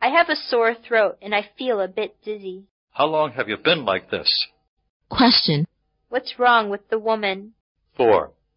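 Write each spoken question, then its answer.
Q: What's wrong with the woman?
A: She has a sore throat and feels dizzy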